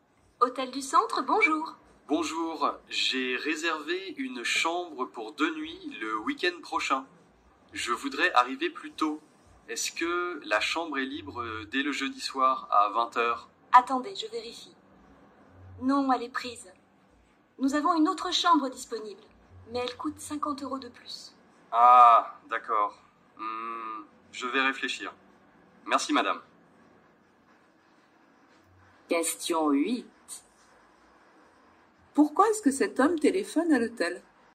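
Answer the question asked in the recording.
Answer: Pour arriver plus tôt (dès le jeudi soir) et modifier sa réservation.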